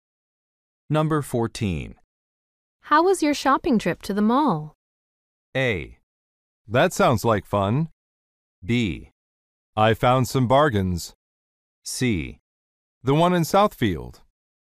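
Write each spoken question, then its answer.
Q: How was your shopping trip to the mall?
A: B: I found some bargains.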